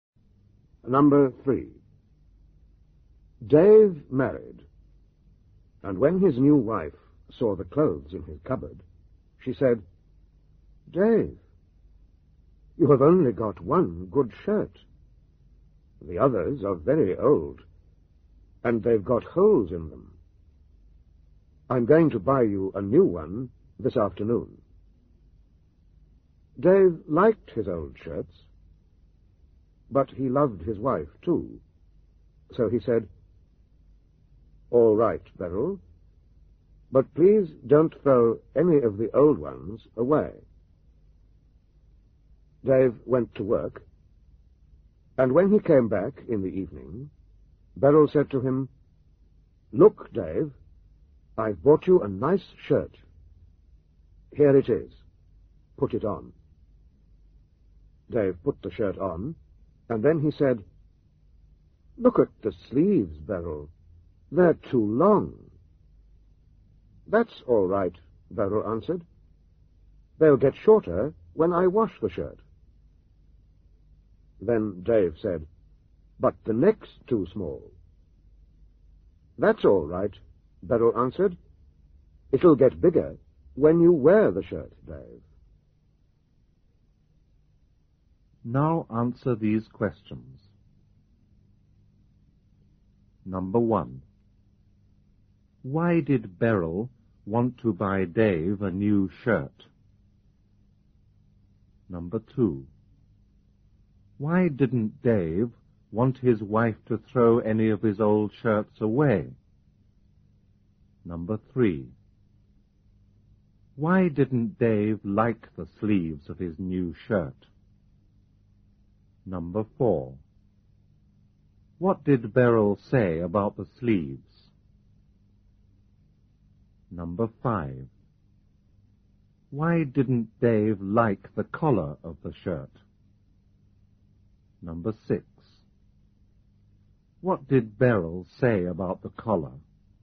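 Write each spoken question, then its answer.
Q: Why did Beryl want to buy Dave a new shirt?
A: He had only one good shirt; the others were very old and had holes in them.

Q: Why didn't Dave want his wife to throw any of his old shirts away?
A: Because he liked his old shirts.

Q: Why didn't Dave like the sleeves of his new shirt?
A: They were too long.

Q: What did Beryl say about the sleeves?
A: They'll get shorter when she washes the shirt.

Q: Why didn't Dave like the collar of the shirt?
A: The neck was too small.

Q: What did Beryl say about the collar?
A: It'll get bigger when he wears the shirt.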